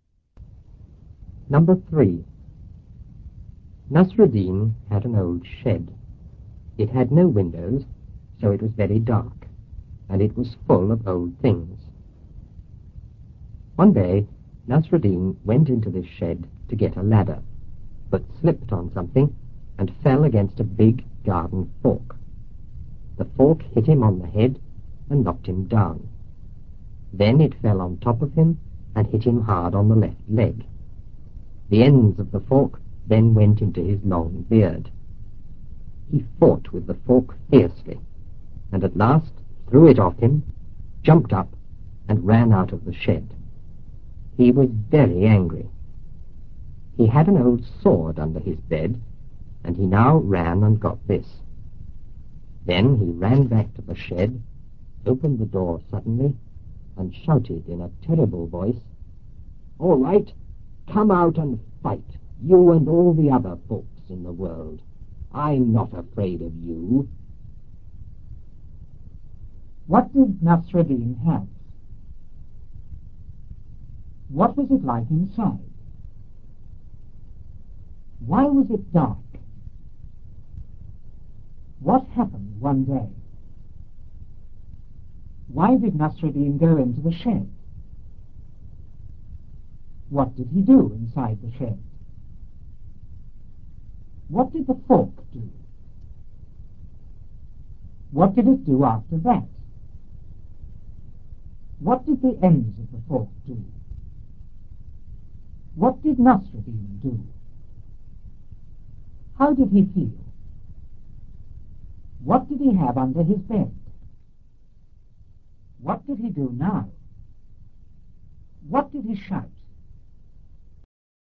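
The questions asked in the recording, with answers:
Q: What did Nasruddin have?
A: An old shed

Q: What was it like inside?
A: Very dark and full of old things

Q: Why was it dark?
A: It had no windows

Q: What happened one day?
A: Nasruddin went into the shed, slipped and fell against a big garden fork

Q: Why did Nasruddin go into the shed?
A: To get a ladder

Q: What did he do inside the shed?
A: He slipped on something and fell against a garden fork

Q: What did the fork do?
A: It hit him on the head and knocked him down

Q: What did it do after that?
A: It fell on top of him and hit him hard on the left leg

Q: What did the ends of the fork do?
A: They went into his long beard

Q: What did Nasruddin do?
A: He fought with the fork, threw it off, jumped up and ran out of the shed

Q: How did he feel?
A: Very angry

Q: What did he have under his bed?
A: An old sword

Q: What did he do now?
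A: He got the sword, ran back to the shed and opened the door suddenly

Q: What did he shout?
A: "All right! Come out and fight, you and all the other folks in the world. I'm not afraid of you."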